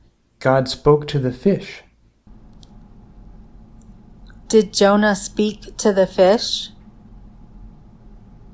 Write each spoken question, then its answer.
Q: Did Jonah speak to the fish?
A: No, God spoke to the fish.